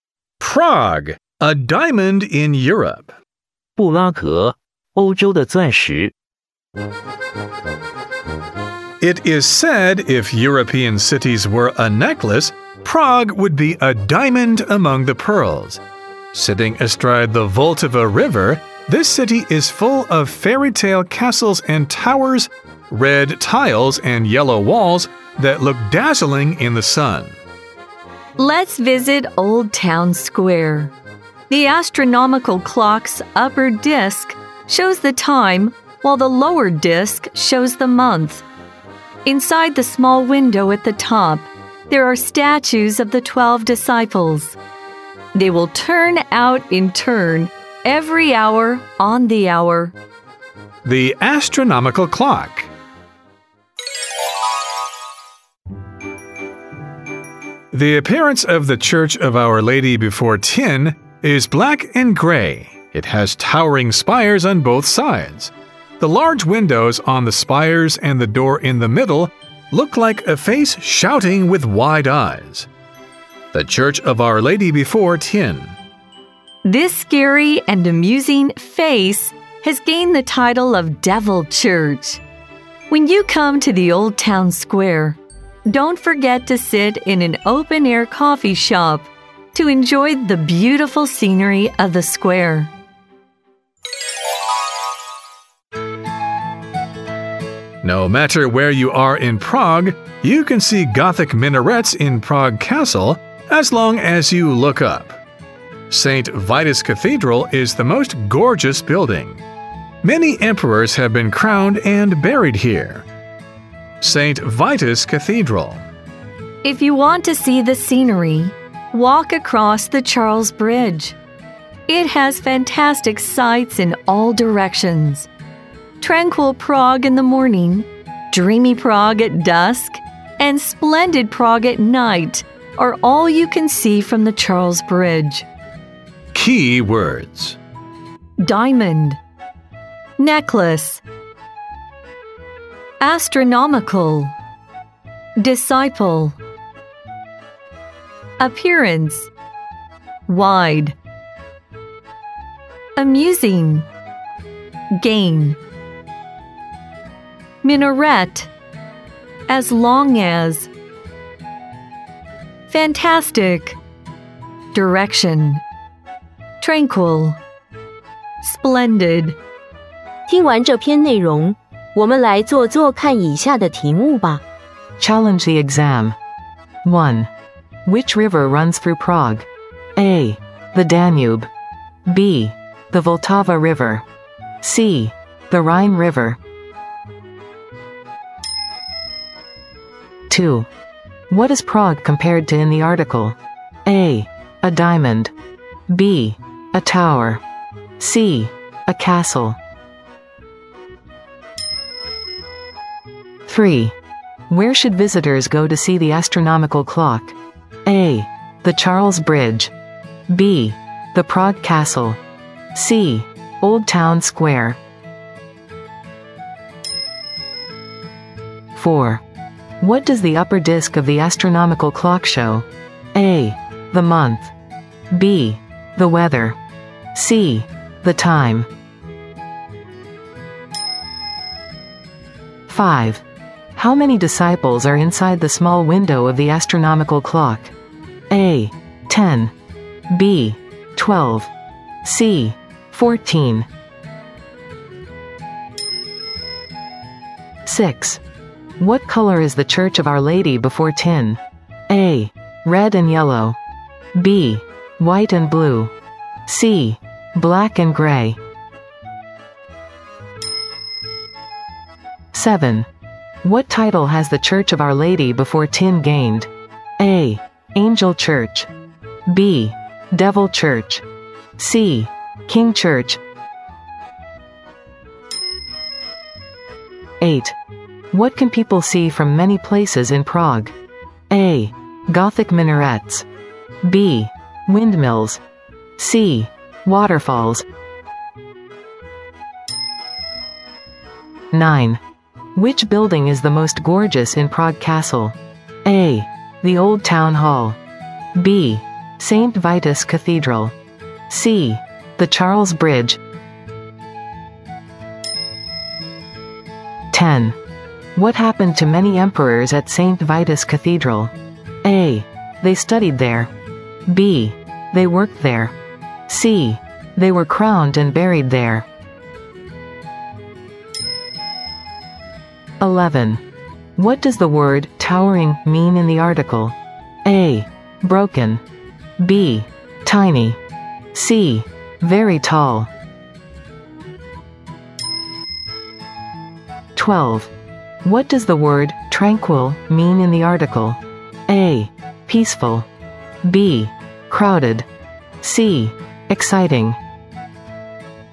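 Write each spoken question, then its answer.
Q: Which river runs through Prague?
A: B: The Vltava River.

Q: What is Prague compared to in the article?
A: A: A diamond.

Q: Where should visitors go to see the astronomical clock?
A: C: Old Town Square.

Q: What does the upper disc of the astronomical clock show?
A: C: The time.

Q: How many disciples are inside the small window of the astronomical clock?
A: B: 12.

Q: What color is the Church of Our Lady before Tin?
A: C: Black and gray.

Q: What title has the Church of Our Lady before Tin gained?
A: B: Devil Church.

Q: What can people see from many places in Prague?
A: A: Gothic minarets.

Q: Which building is the most gorgeous in Prague Castle?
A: B: St. Vitus Cathedral.

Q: What happened to many emperors at St. Vitus Cathedral?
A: C: They were crowned and buried there.

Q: What does the word towering mean in the article?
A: C: Very tall.

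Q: What does the word tranquil mean in the article?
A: A: Peaceful.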